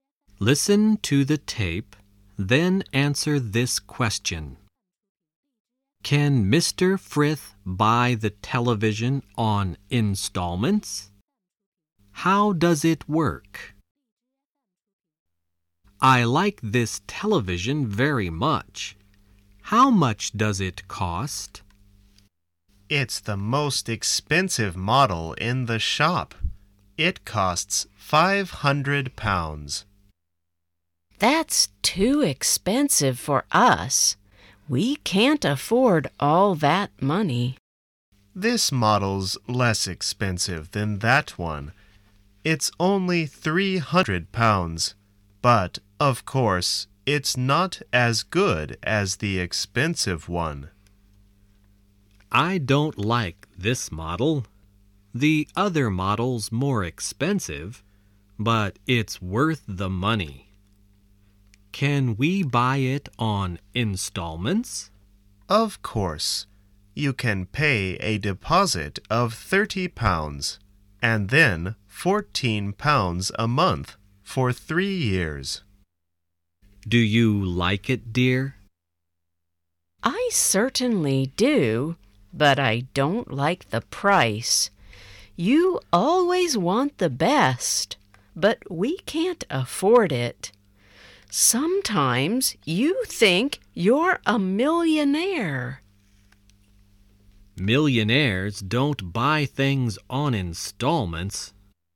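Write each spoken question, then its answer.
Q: Can Mr. Frith buy the television on installments?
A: Yes, he can pay a deposit of £30 and then £14 a month for 3 years.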